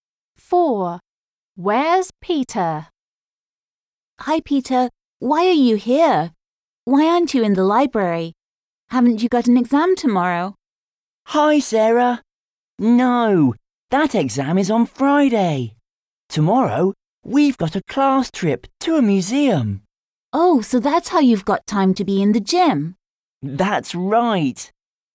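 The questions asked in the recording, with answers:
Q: Where's Peter?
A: In the gym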